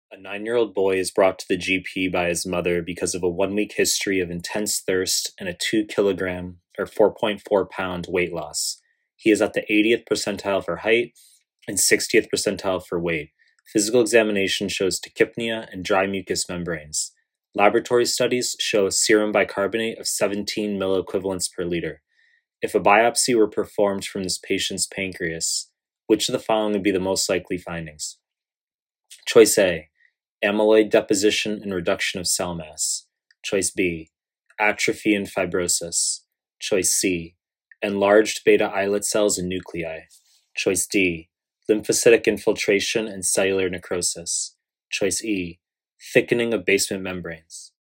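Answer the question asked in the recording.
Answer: D: lymphocytic infiltration and cellular necrosis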